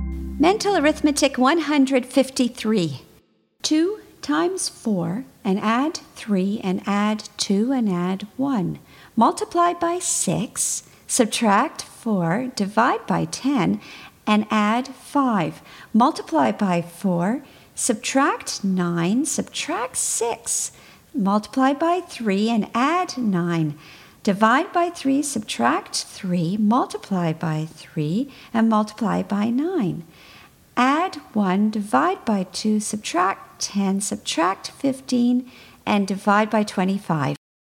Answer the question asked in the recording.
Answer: And the answer is 19.